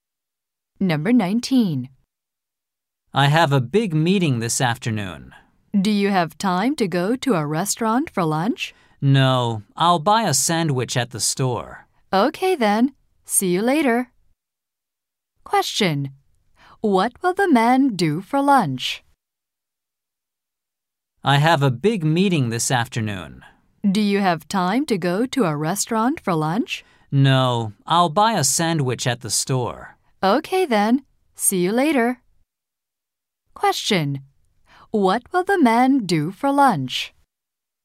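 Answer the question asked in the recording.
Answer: Buy a sandwich at the store.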